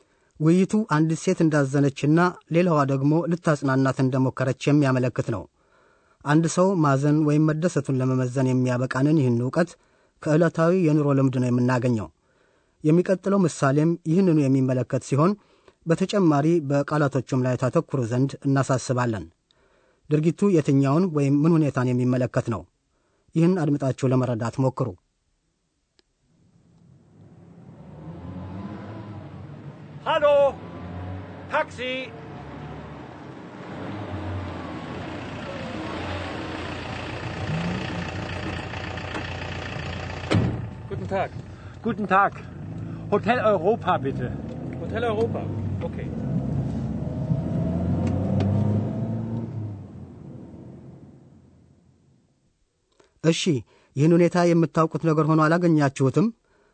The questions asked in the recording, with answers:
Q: ድርጊቱ የትኛውን ወይም ምን ሁኔታን የሚመለከት ነው?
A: እንዲህ ነው። አንድ ሰው በመንገድ ላይ ታክሲ ታክሲ ያስቆምና የት ሊሄድ እንደሚፈልግ ማለትም ወደ ሆቴል ሆቴል መሄድ እንደሚፈልግ ይናገራል።